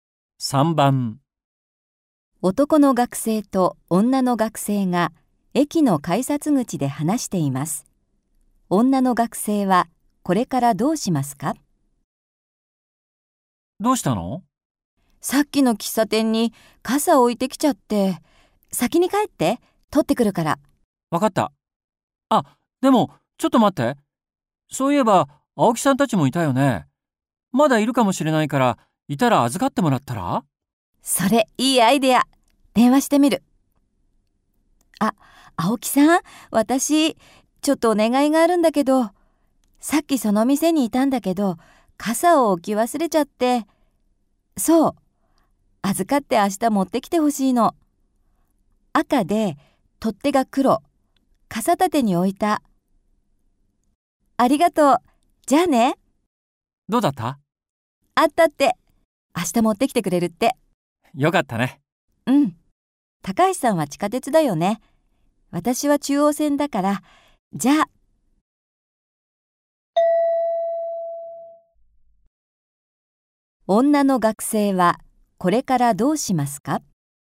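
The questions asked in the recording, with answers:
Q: 女の学生はこれからどうしますか?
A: 傘を取りに行かずに、中央線で帰る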